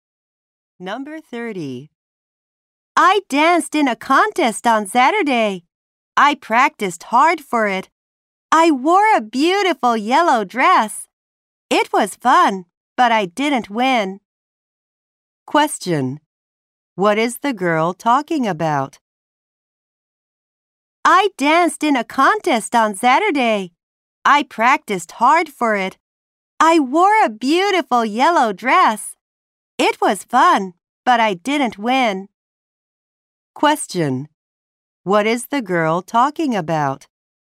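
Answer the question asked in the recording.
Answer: A dance contest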